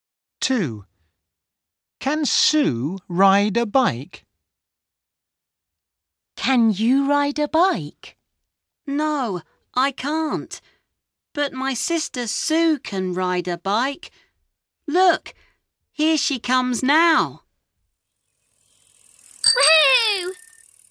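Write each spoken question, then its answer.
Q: Can Sue ride a bike?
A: Yes, she can.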